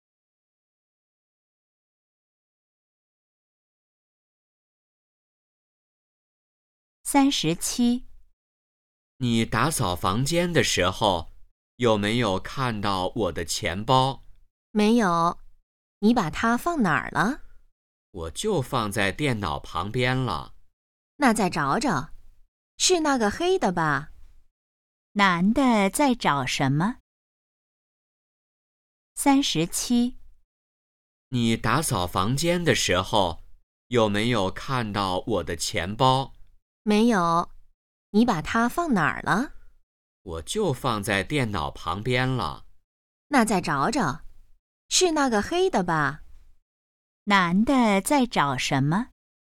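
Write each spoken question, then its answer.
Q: 男的在找什么?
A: 钱包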